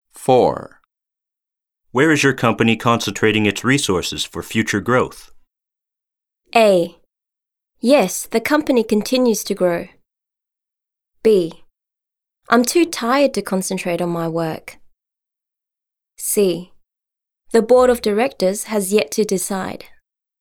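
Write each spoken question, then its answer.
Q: Where is your company concentrating its resources for future growth?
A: C: The board of directors has yet to decide.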